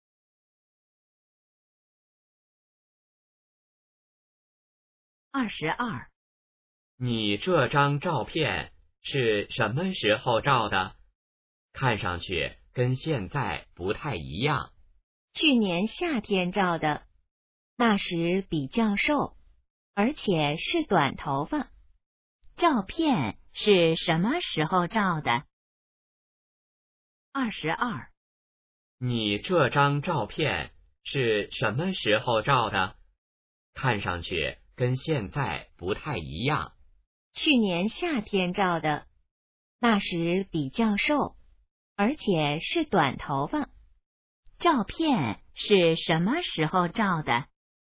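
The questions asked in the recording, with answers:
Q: 照片是什么时候照的?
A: 去年夏天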